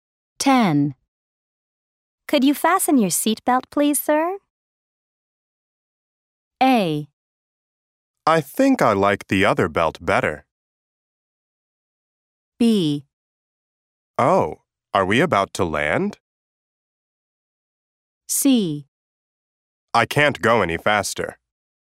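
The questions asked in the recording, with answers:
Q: Could you fasten your seatbelt, please, sir?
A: B: Oh, are we about to land?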